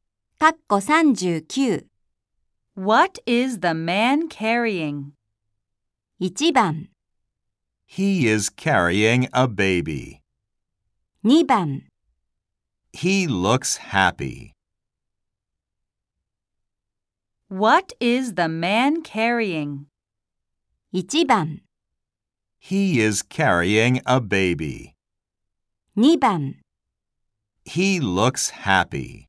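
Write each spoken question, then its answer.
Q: What is the man carrying?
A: 1: He is carrying a baby.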